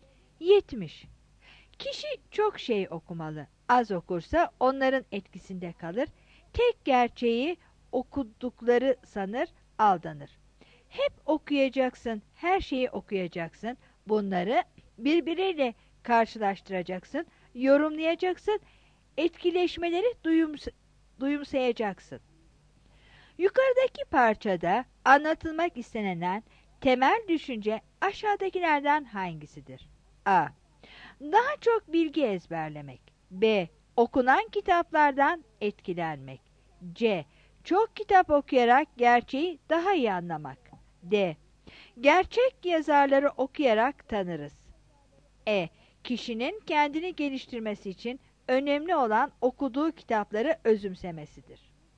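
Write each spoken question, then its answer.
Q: Yukarıdaki parçada anlatılmak istenen temel düşünce aşağıdakilerden hangisidir?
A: C: Çok kitap okuyarak gerçeği daha iyi anlamak.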